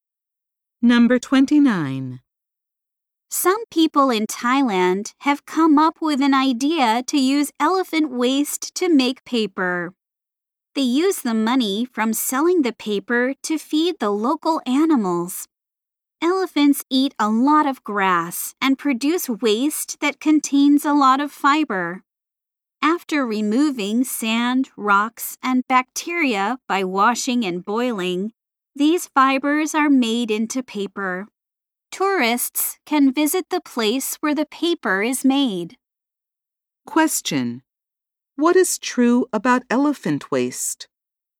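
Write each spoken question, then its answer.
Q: What is true about elephant waste?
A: It contains a lot of fiber and is used to make paper.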